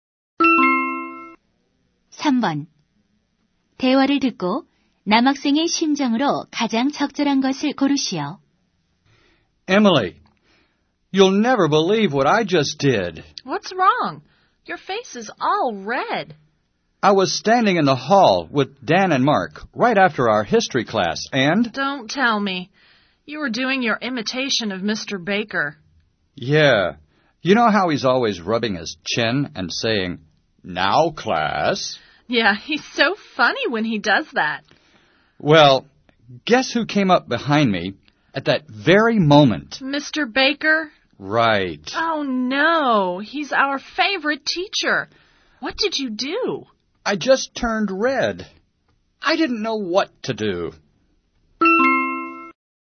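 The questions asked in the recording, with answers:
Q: 대화를 듣고 남학생의 심정으로 가장 적절한 것을 고르시오.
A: 당황스럽다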